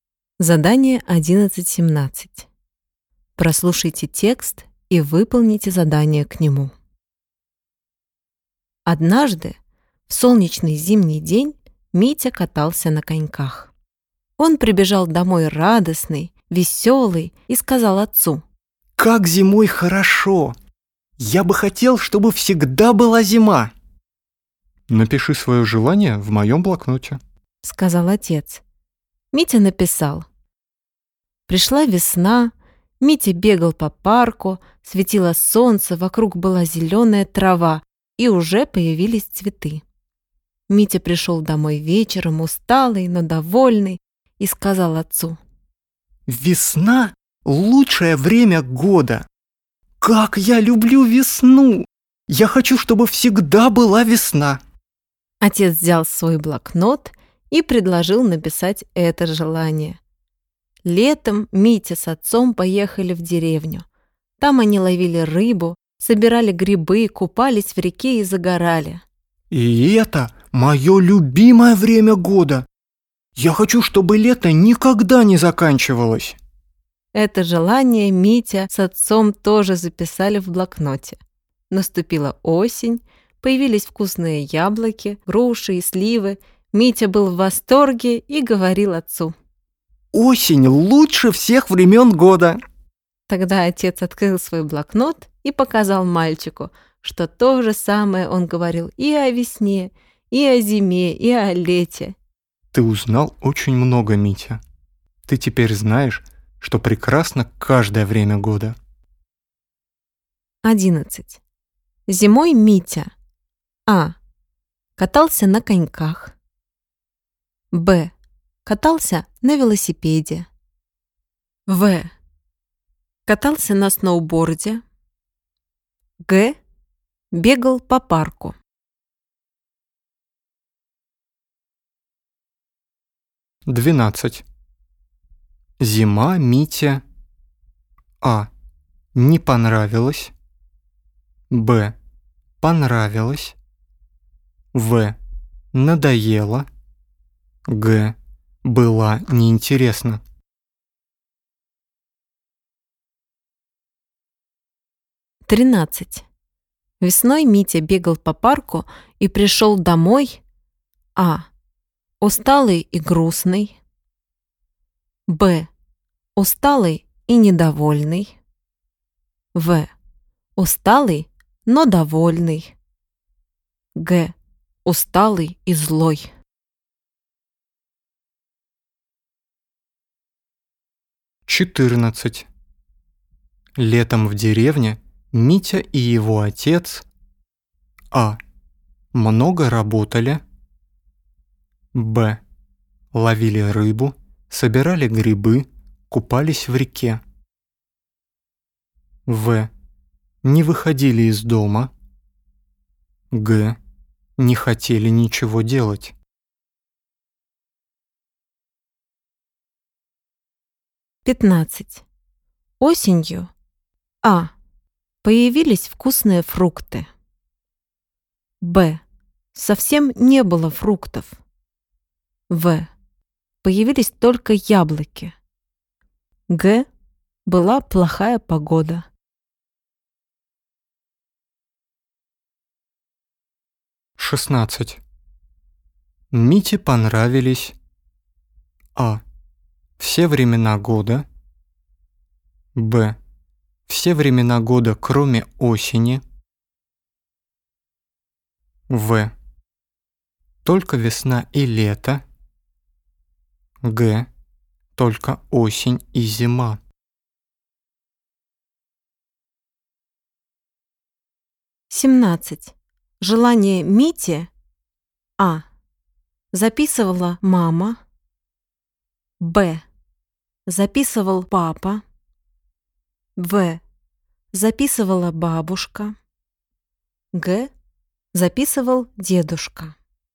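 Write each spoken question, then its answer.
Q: Зимой Митя:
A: А: катался на коньках

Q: Зима Мите:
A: Б: понравилось

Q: Весной Митя бегал по парку и пришел домой:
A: В: усталый, но довольный

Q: Летом в деревне Митя и его отец:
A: Б: ловили рыбу, собирали грибы, купались в реке

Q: Осенью:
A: А: появились вкусные фрукты

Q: Мите понравились:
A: А: все времена года

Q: Желание Мити:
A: Б: записывал папа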